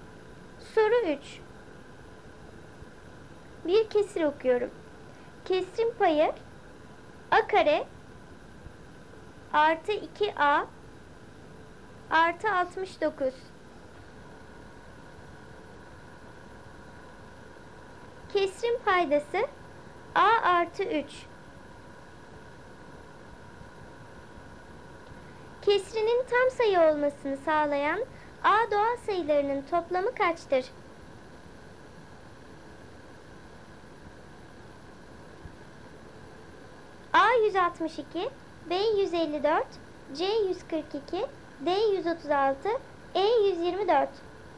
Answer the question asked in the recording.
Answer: Doğru cevap A 162.